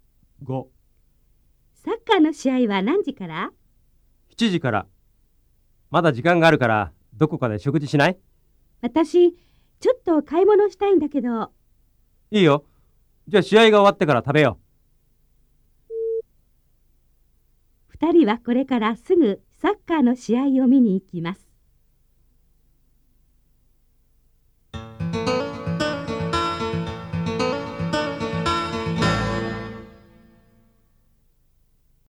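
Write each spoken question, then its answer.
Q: 2人はこれからすぐサッカーの試合を見に行きます。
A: ×(まちがい)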